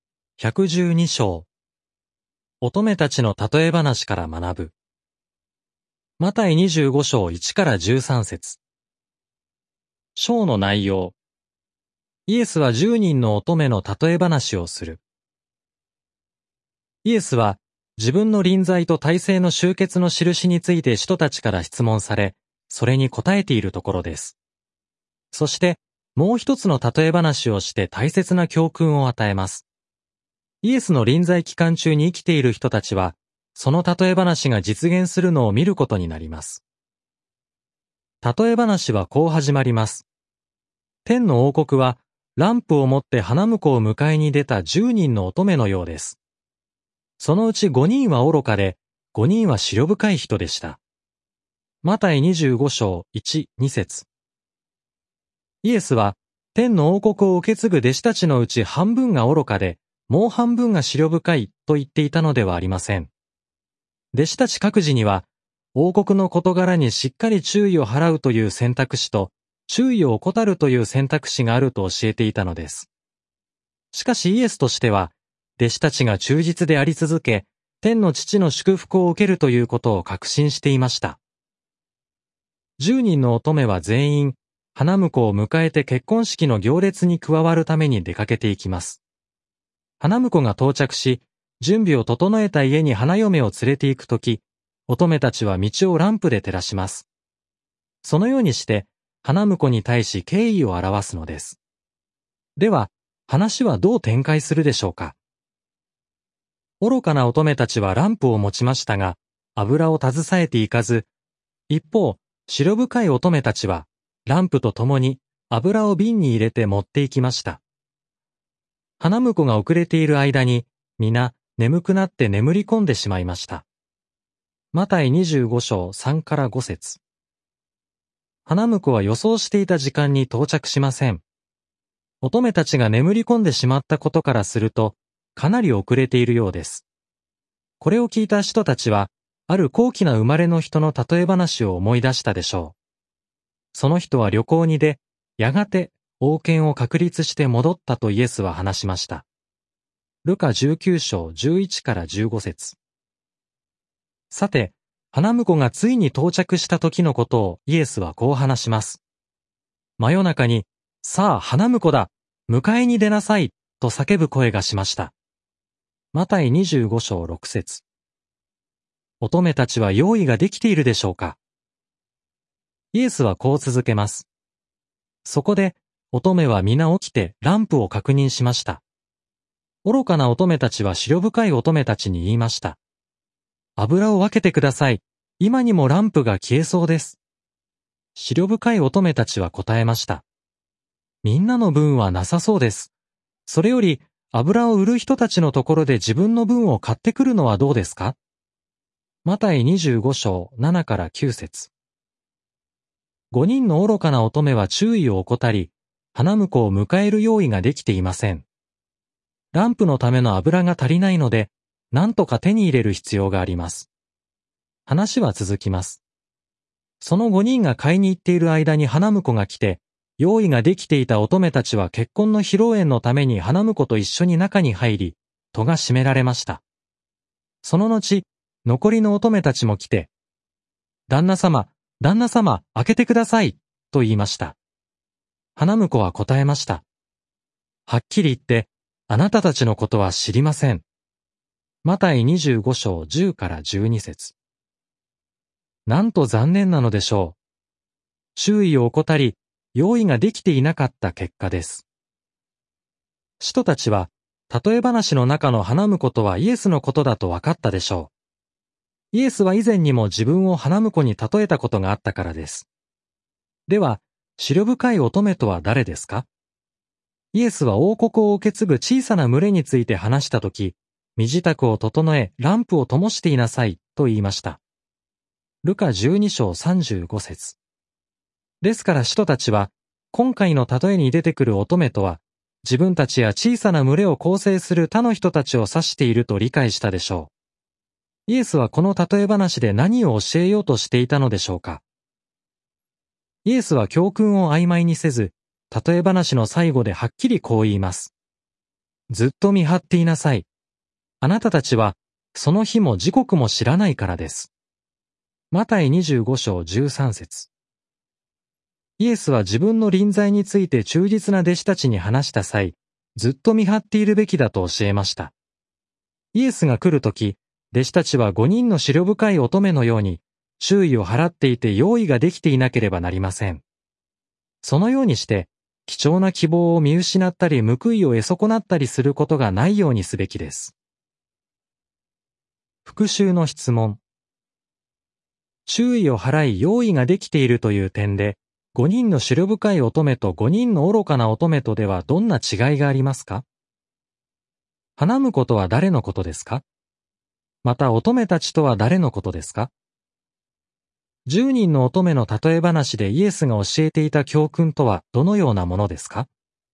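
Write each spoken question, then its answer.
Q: 注意を払い用意ができているという点で、5人の思慮深い乙女と5人の愚かな乙女とではどんな違いがありますか?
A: 思慮深い乙女はランプと共に油を瓶に入れて持っていき用意ができていたが、愚かな乙女は油を携えず用意ができていなかった

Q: 花婿とは誰のことですか?また乙女たちとは誰のことですか?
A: 花婿はイエス、乙女たちは使徒たちや王国を受け継ぐ小さな群れの人たち

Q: 10人の乙女の例え話でイエスが教えていた教訓とはどのようなものですか?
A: その日も時刻も分からないので、ずっと見張っていて用意ができているべきだということ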